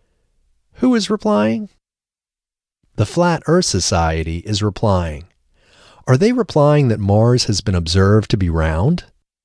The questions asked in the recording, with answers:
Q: Are they replying that Mars has been observed to be round?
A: Yes, they are replying that Mars has been observed to be round.